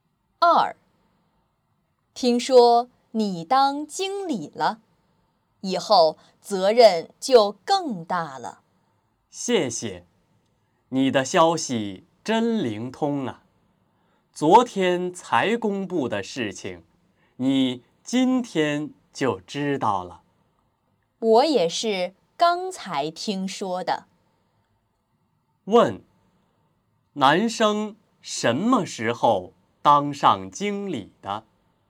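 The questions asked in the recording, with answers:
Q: 男生什么时候当上经理的?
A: 昨天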